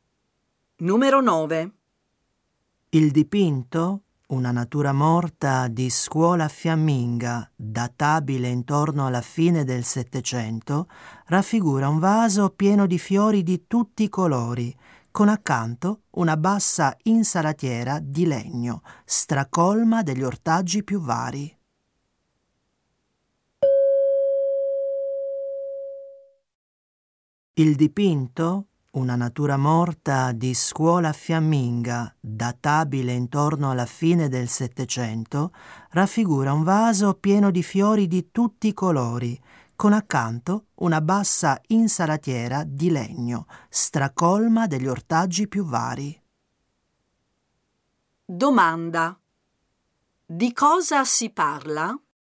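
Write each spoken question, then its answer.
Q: Domanda. Di cosa si parla?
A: Di un dipinto (una natura morta)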